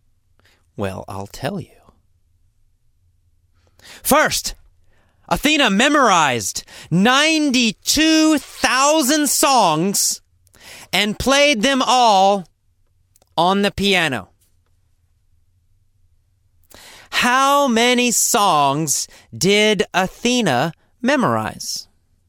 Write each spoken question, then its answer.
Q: How many songs did Athena memorize?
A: She memorized 92,000 songs.